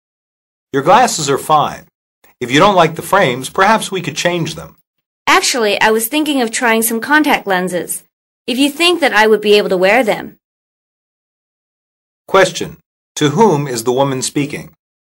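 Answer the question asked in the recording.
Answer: An optometrist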